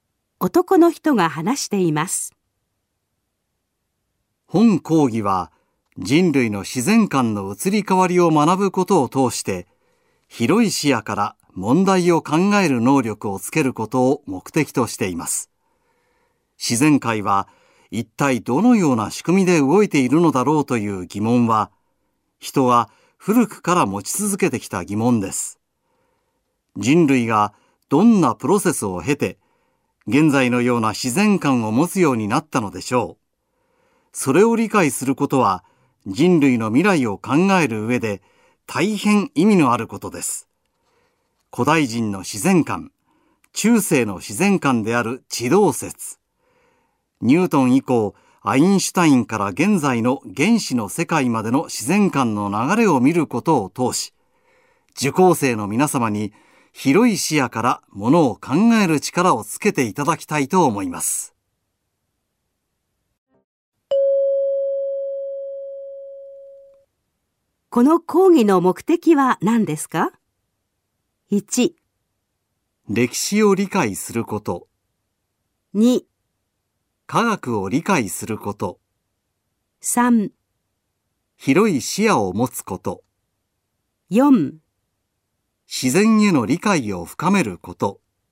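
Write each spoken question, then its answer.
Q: この講義の目的は何ですか?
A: 3: 広い視野を持つこと。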